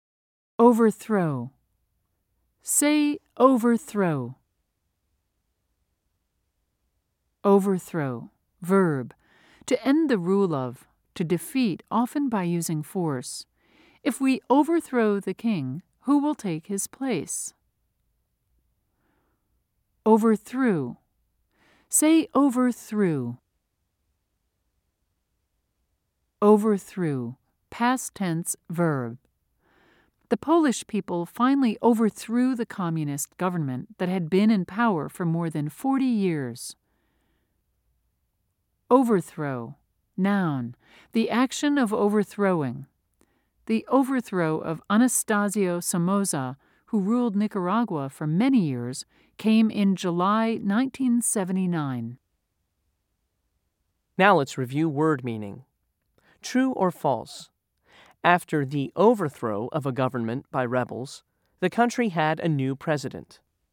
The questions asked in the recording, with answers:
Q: True or false? After the overthrow of a government by rebels, the country had a new president.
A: If you said true, you were right.